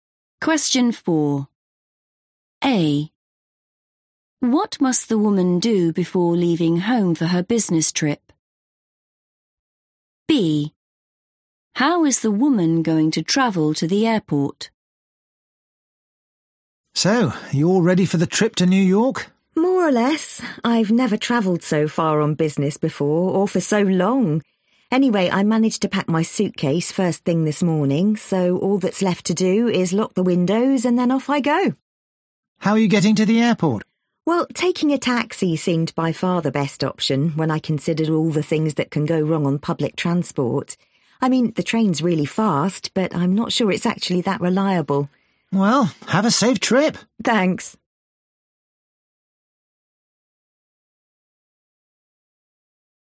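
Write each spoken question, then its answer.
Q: What must the woman do before leaving home for her business trip?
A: lock the windows

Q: How is the woman going to travel to the airport?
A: by taxi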